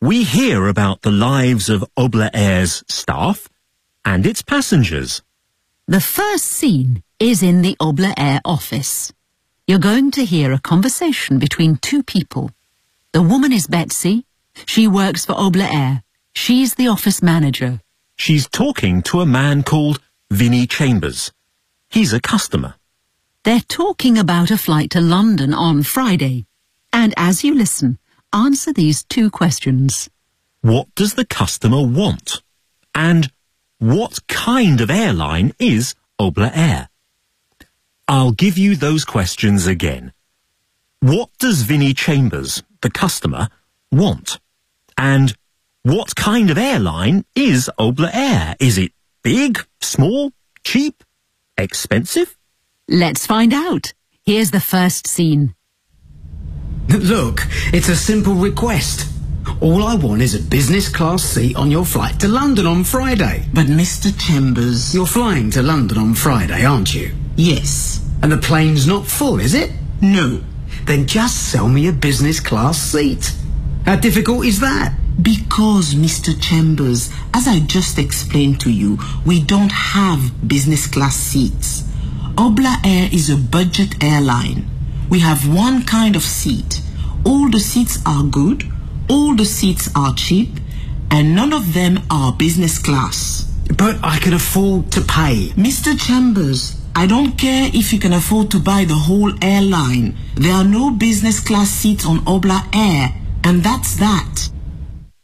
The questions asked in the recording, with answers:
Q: What does the customer want?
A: He wants a business class seat.

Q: And what kind of airline is Obla Air?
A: It's a budget airline.